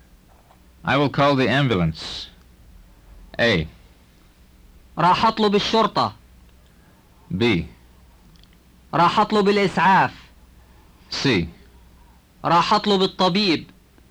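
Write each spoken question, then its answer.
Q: I will call the ambulance.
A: B: راح أطلب الإسعاف.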